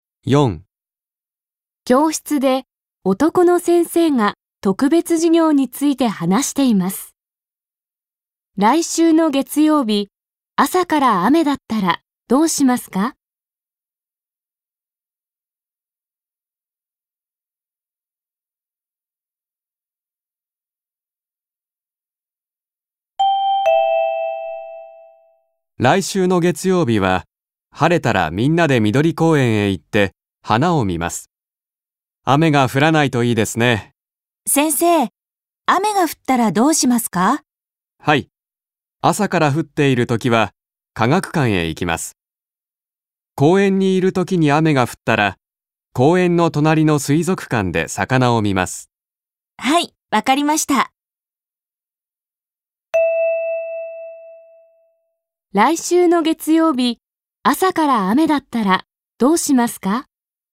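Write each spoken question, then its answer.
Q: 来週の月曜日、朝から雨だったらどうしますか?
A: 科学館へ行きます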